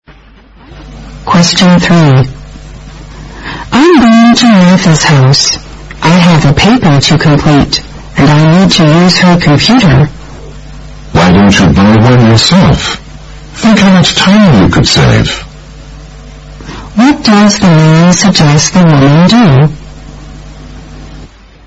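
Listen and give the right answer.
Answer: Buy a computer herself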